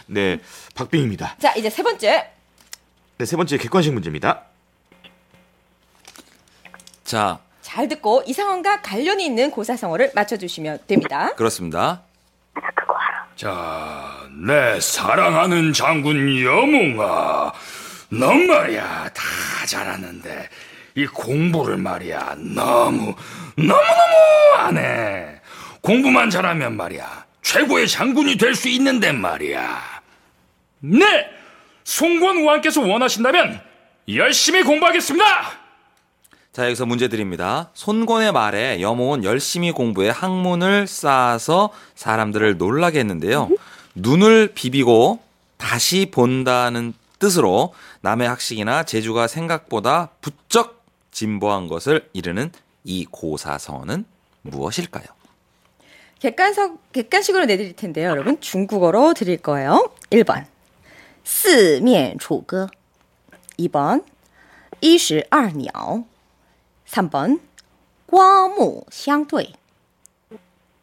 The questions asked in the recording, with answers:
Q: 눈을 비비고 다시 본다는 뜻으로 남의 학식이나 재주가 생각보다 부쩍 진보한 것을 이르는 이 고사성어는 무엇일까요?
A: 정답입니다. 네. 3번 괄목상대가 정답이었죠.